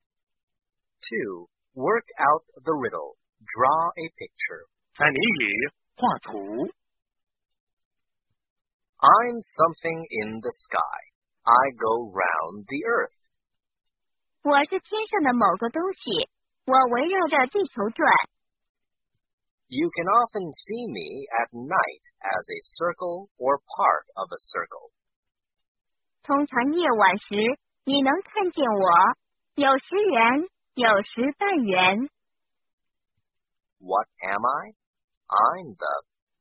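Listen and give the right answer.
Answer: the moon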